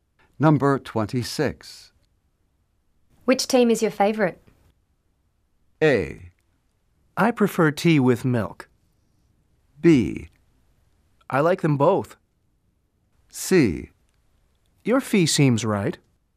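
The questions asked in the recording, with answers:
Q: Which team is your favorite?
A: B: I like them both.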